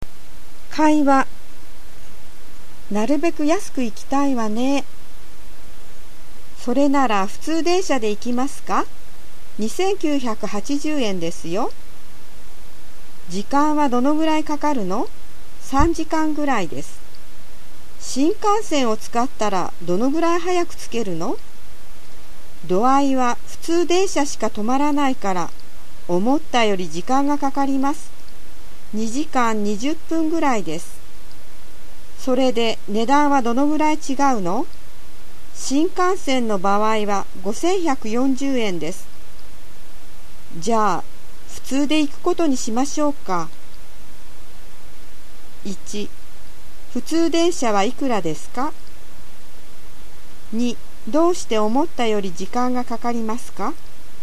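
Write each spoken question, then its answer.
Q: 普通電車はいくらですか?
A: 2980円

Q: どうして思ったより時間がかかりますか?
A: 目的地には普通電車しか止まらないから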